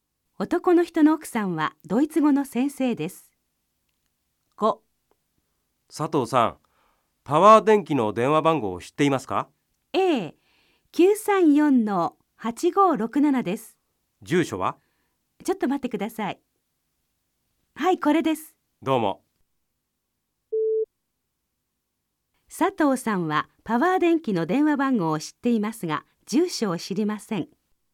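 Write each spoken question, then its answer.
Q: 佐藤さんはパワー電気の電話番号を知っていますが、住所を知りません。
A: 正しくない(住所も知っている)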